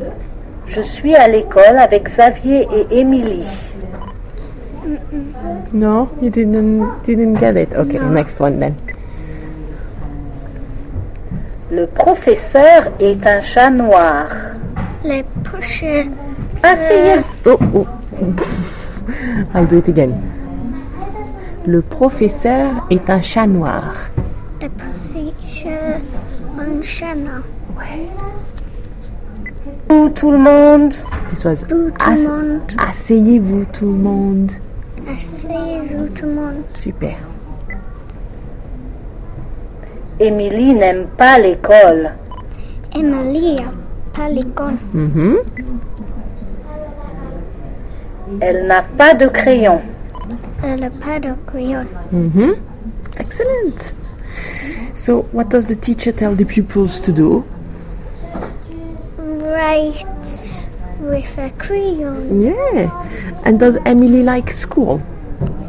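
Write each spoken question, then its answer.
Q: So, what does the teacher tell the pupils to do?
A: Sit down

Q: And does Émilie like school?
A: No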